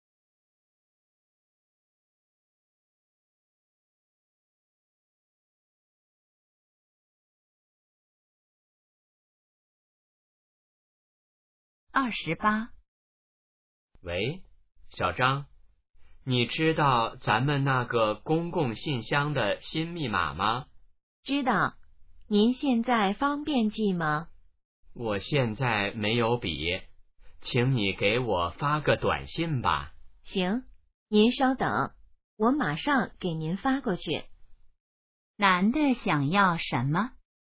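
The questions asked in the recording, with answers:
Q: 男的想要什么?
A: 公共信箱的新密码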